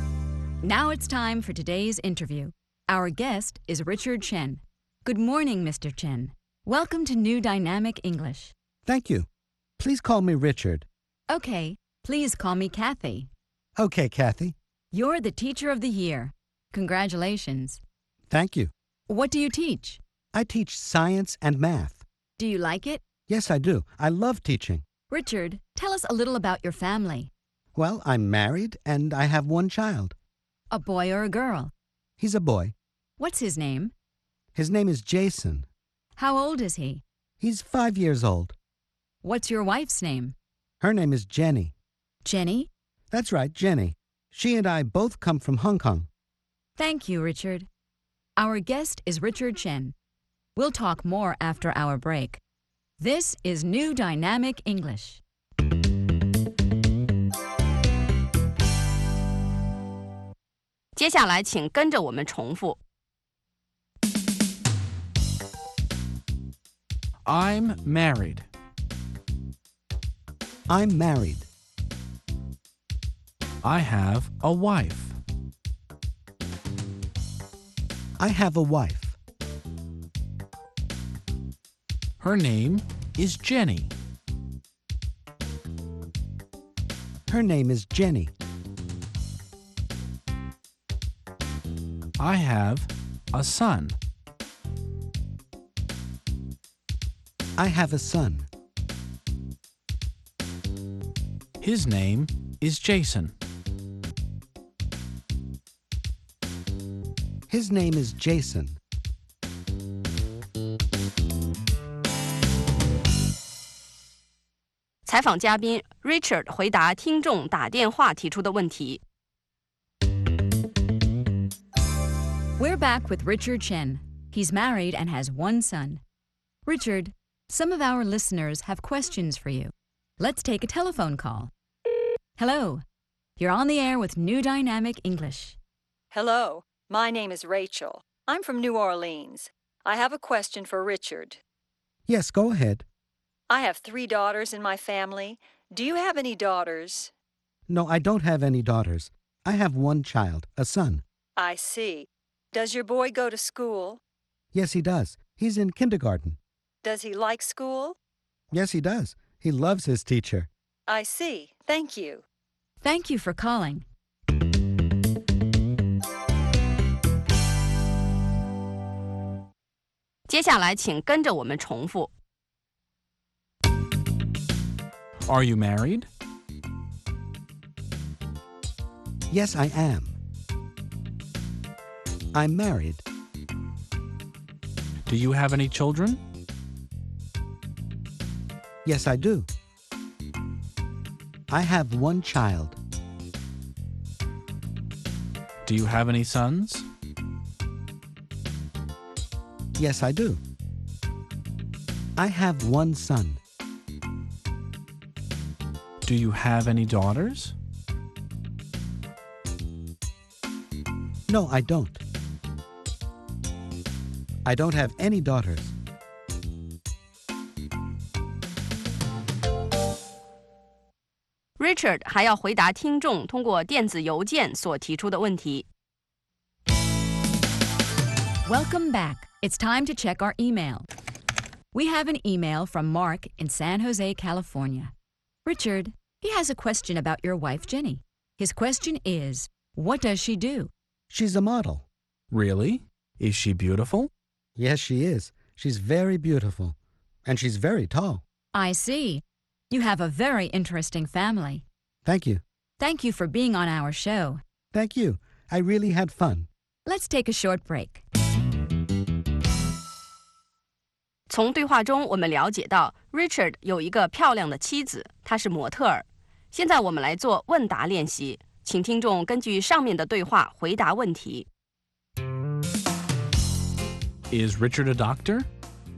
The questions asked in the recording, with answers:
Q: Is Richard a doctor?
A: No, he isn't. He's a teacher.